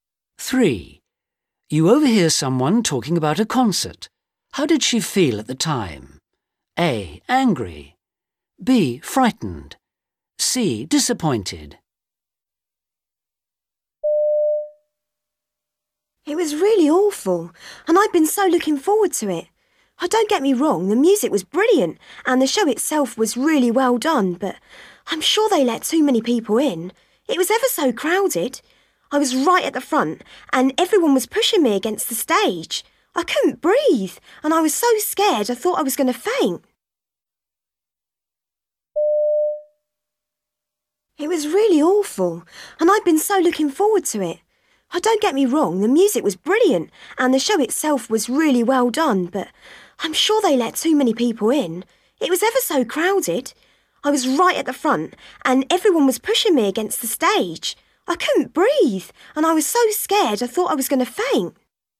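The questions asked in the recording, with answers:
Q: How did she feel at the time?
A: B: Frightened.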